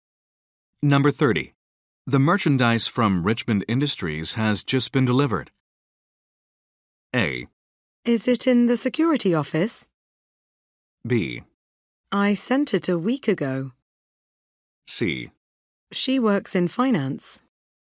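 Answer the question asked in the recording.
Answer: A: Is it in the security office?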